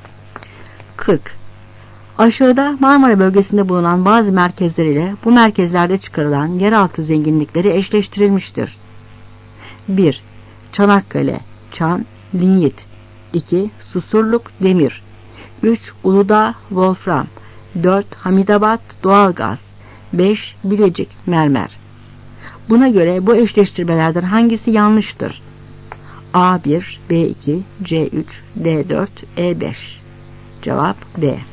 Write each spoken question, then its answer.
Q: Buna göre bu eşleştirmelerden hangisi yanlıştır?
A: Cevap D.